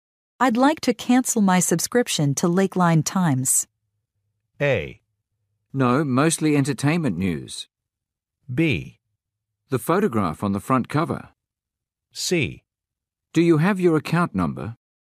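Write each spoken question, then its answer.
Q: I'd like to cancel my subscription to Lakeline Times.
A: C: Do you have your account number?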